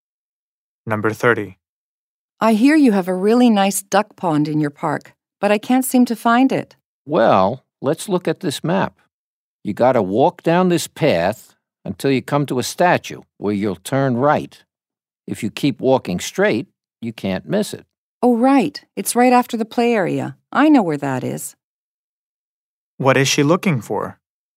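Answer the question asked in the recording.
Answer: The duck pond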